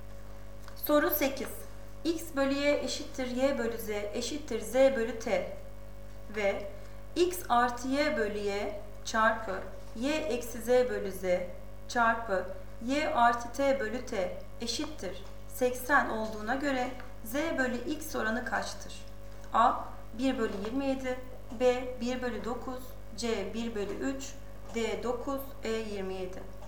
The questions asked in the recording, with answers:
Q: X bölü Y eşittir Y bölü Z eşittir Z bölü T ve X artı Y bölü Y çarpı Y eksi Z bölü Z çarpı Y artı T bölü T eşittir 80 olduğuna göre Z bölü X oranı kaçtır?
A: Doğru cevap B 1 bölü 9.